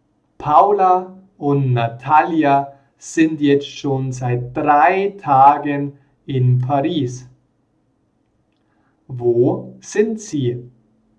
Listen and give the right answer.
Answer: In Paris. Sie sind in Paris.